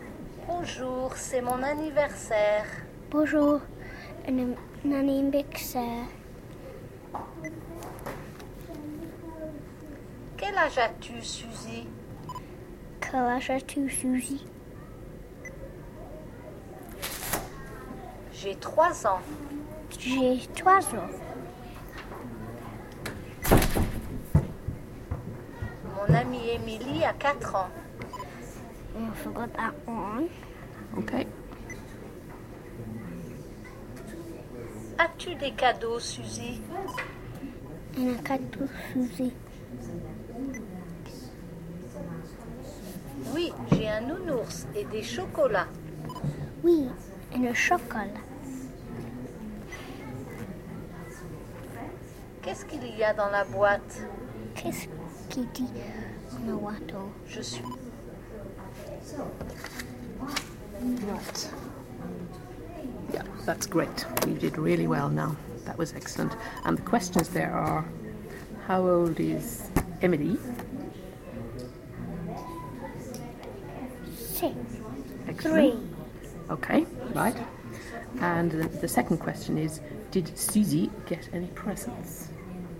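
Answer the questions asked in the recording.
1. Four
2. Yes, a teddy bear and chocolates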